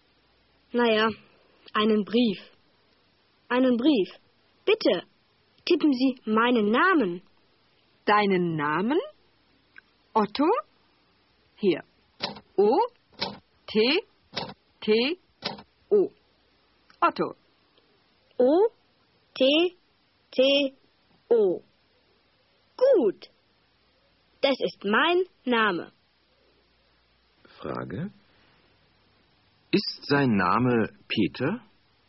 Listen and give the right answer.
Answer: Nein, sein Name ist nicht Peter.